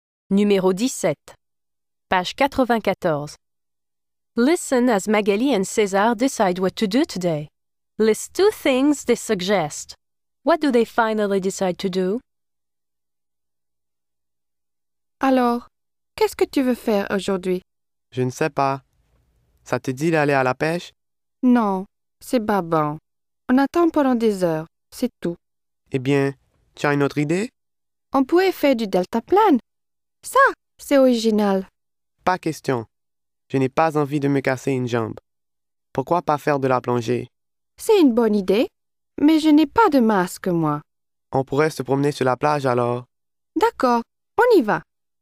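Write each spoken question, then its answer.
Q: List two things they suggest.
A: Two of these: going fishing, hang gliding, scuba diving, walking on the beach

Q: What do they finally decide to do?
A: Take a walk on the beach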